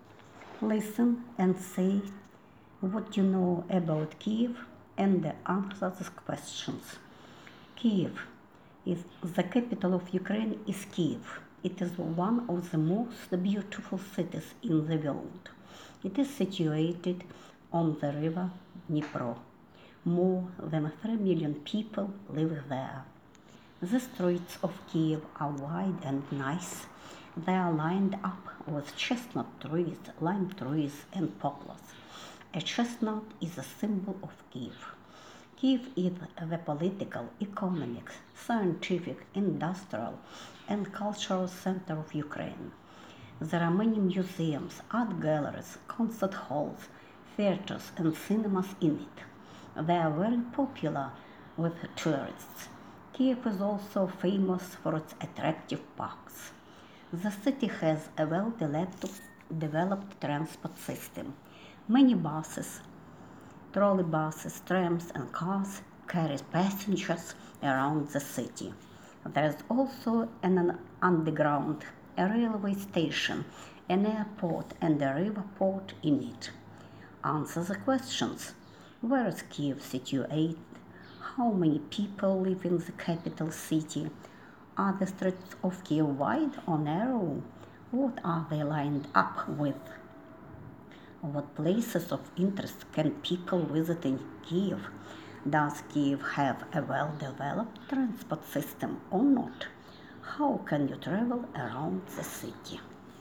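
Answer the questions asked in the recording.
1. On the river Dnipro
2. More than 3 million
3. Wide
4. Chestnut trees, lime trees and poplars
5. Museums, art galleries, concert halls, theaters, cinemas and parks
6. Yes; by bus, trolley bus, tram, car or underground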